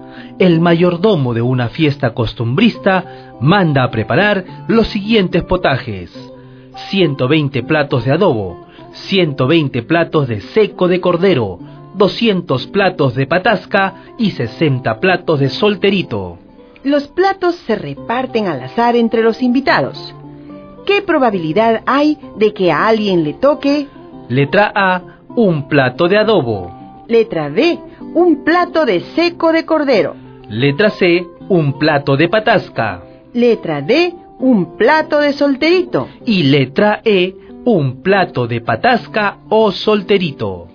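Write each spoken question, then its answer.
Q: Letra A, un plato de adobo.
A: 120/500 = 6/25

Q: Letra B, un plato de seco de cordero.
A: 120/500 = 6/25

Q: Letra C, un plato de patasca.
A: 200/500 = 2/5

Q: Letra D, un plato de solterito.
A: 60/500 = 3/25

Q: Y letra E, un plato de patasca o solterito.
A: 260/500 = 13/25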